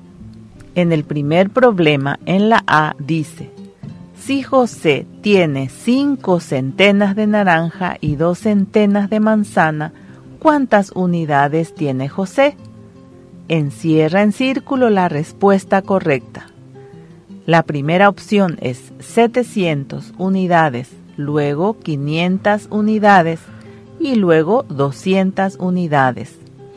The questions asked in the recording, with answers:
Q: si José tiene 5 centenas de naranja y 2 centenas de manzana, ¿cuántas unidades tiene José?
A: Entonces la respuesta correcta es el número 700.